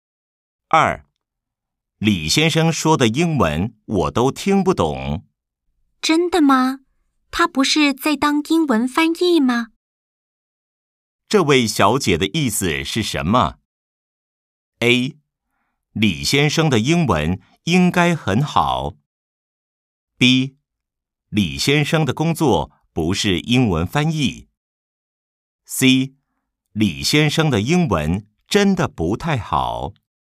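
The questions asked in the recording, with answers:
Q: 这位小姐的意思是什么?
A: A: 李先生的英文应该很好。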